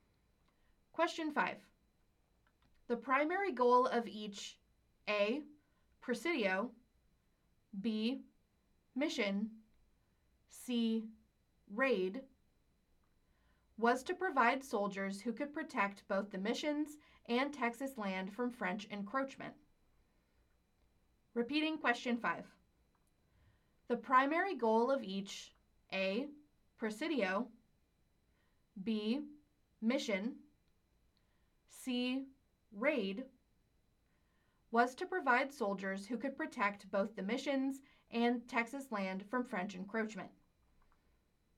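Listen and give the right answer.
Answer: A: presidio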